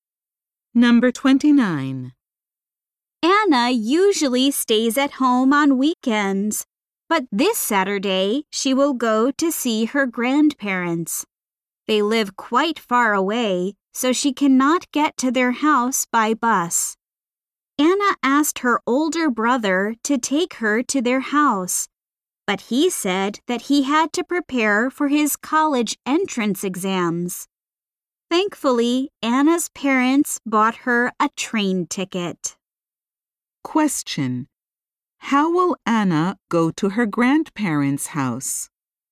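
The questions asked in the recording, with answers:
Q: How will Anna go to her grandparents' house?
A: By train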